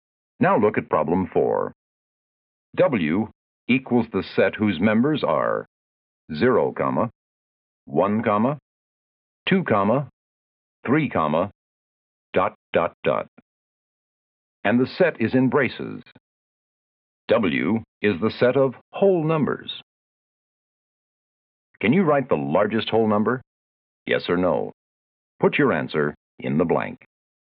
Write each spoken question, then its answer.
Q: Can you write the largest whole number?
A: I hope you wrote no, because nobody can name the largest whole number.